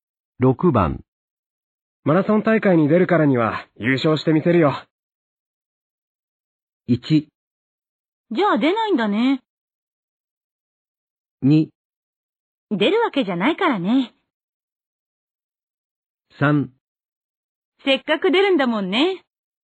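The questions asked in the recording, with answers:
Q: マラソン大会に出るからには優勝してみせるよ。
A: 3: せっかく出るんだもんね。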